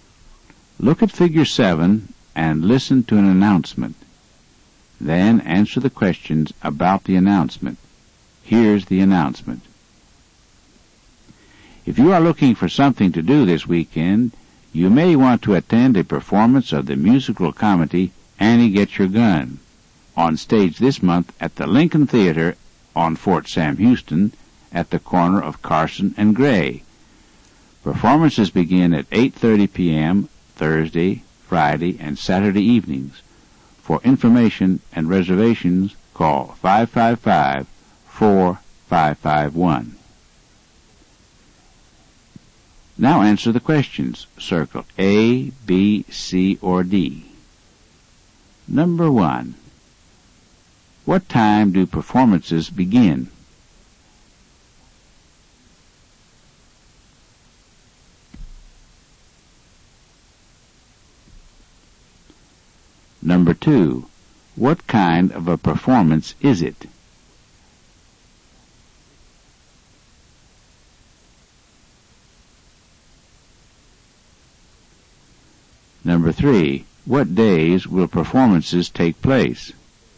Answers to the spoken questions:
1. The answer to number 1 is A, 8:30 p.m.
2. Number 2 is C, a musical comedy.
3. Number 3 is D, Thursday, Friday, and Saturday.